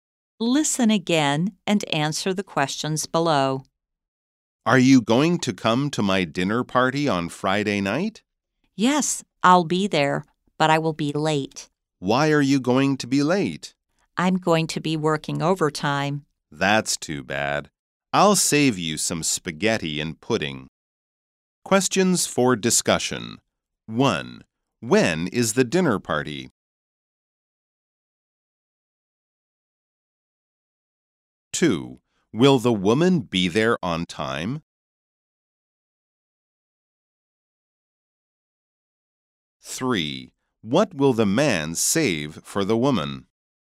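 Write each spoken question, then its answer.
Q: When is the dinner party?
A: On Friday night

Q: Will the woman be there on time?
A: No, she will be late because she is working overtime

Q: What will the man save for the woman?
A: Some spaghetti and pudding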